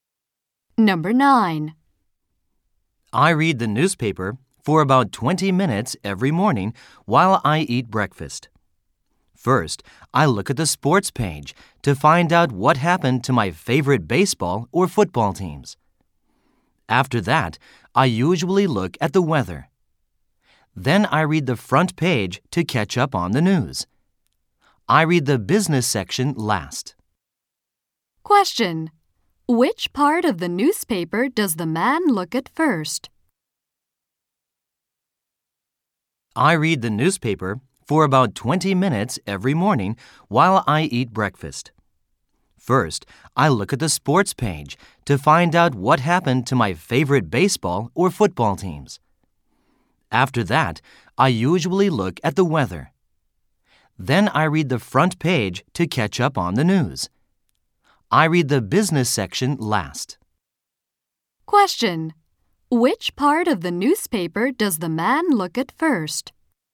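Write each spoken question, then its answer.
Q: Which part of the newspaper does the man look at first?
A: The sports page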